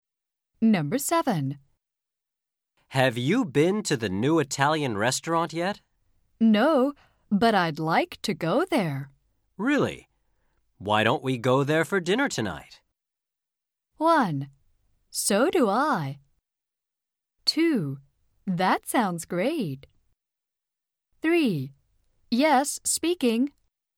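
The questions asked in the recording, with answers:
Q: Really? Why don't we go there for dinner tonight?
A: 2: That sounds great.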